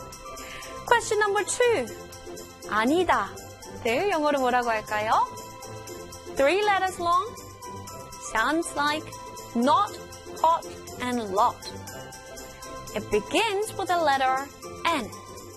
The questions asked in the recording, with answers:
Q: 아니다. 를 영어로 뭐라고 할까요?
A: 아니다. N-O-T. Not.